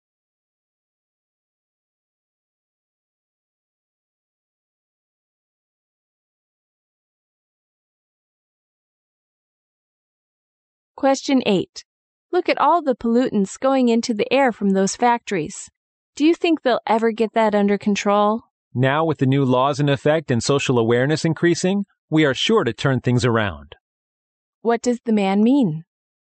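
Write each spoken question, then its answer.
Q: What does the man mean?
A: The pollution will be brought under control.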